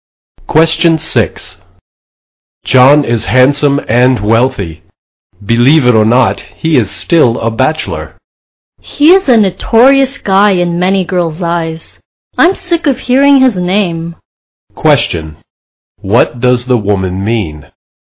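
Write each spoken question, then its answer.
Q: What does the woman mean?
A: She dislikes John and is tired of hearing about him.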